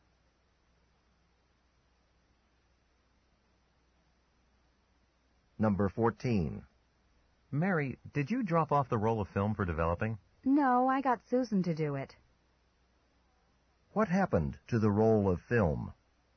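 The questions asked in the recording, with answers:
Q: What happened to the roll of film?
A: Susan dropped it off for developing.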